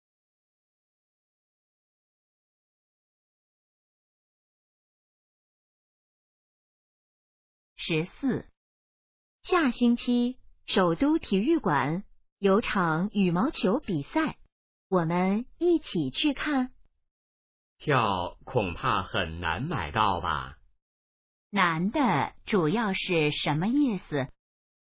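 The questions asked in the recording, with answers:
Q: 难的主要是什么意思?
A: 票很难买到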